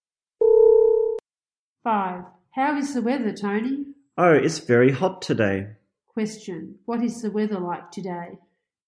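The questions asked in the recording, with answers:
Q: Question, what is the weather like today?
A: It's very hot.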